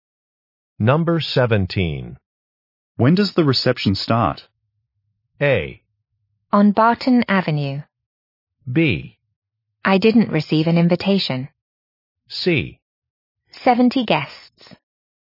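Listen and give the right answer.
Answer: B: I didn't receive an invitation.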